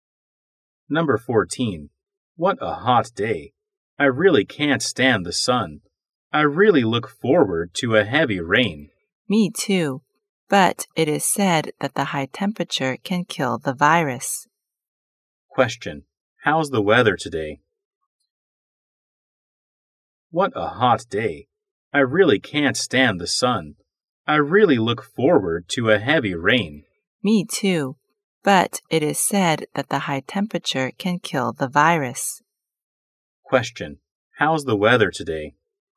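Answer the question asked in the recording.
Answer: Hot and sunny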